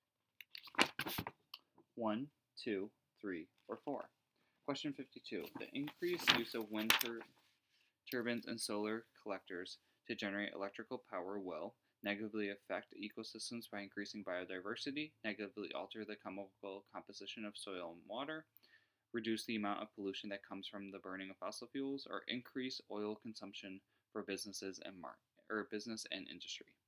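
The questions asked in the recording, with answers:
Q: The increased use of wind turbines and solar collectors to generate electrical power will negatively affect ecosystems by increasing biodiversity, negatively alter the chemical composition of soil and water, reduce the amount of pollution that comes from the burning of fossil fuels, or increase oil consumption for businesses and business and industry.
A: reduce the amount of pollution that comes from the burning of fossil fuels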